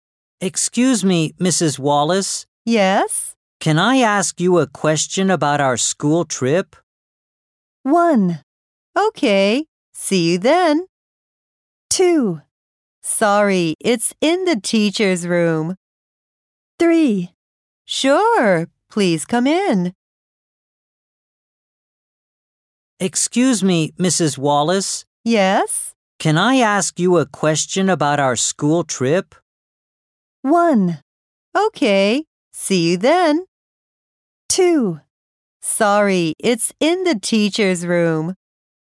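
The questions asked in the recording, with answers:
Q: Can I ask you a question about our school trip?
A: 3: Sure, please come in.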